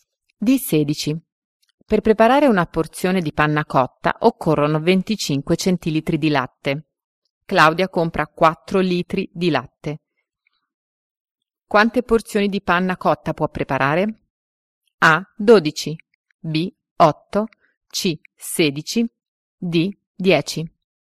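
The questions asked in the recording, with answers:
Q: Quante porzioni di panna cotta può preparare?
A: C: 16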